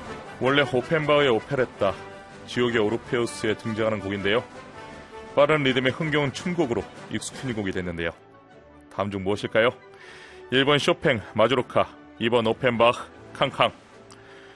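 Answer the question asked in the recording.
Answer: 2: 오펜바흐, 캉캉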